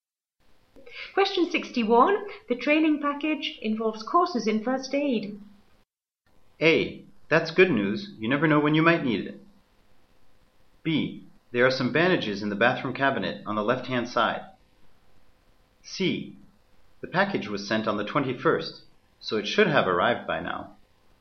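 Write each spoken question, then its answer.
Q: The training package involves courses in first aid.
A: A: That's good news. You never know when you might need it.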